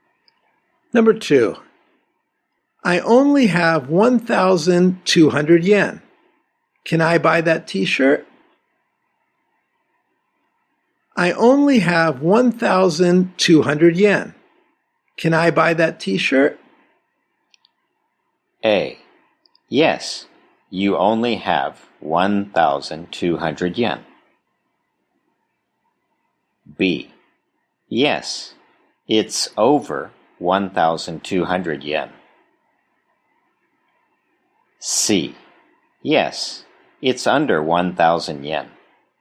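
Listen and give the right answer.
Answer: C: Yes, it's under 1,000 yen.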